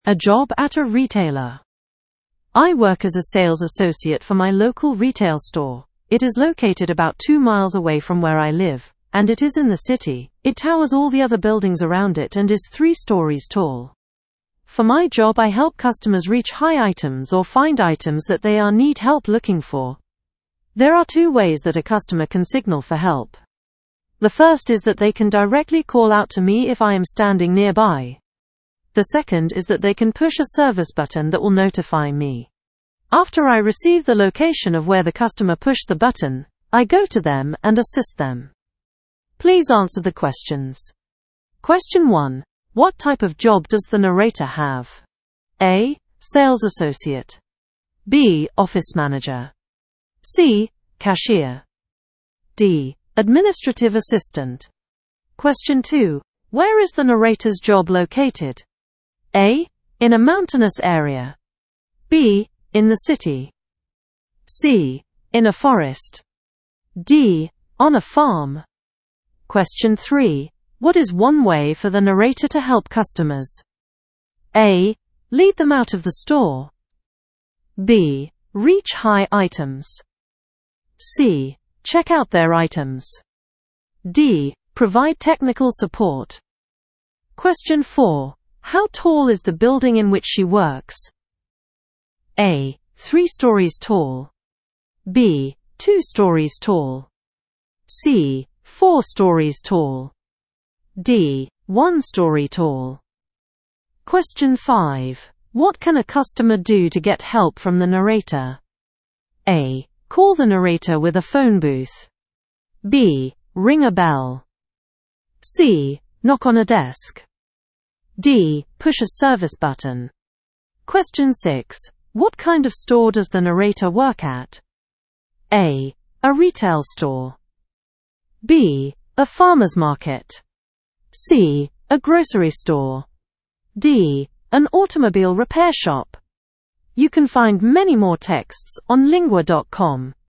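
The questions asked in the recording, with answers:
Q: What type of job does the narrator have?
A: A: Sales associate.

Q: Where is the narrator's job located?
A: B: In the city.

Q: What is one way for the narrator to help customers?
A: B: Reach high items.

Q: How tall is the building in which she works?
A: A: 3 stories tall.

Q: What can a customer do to get help from the narrator?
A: D: Push a service button.

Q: What kind of store does the narrator work at?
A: A: A retail store.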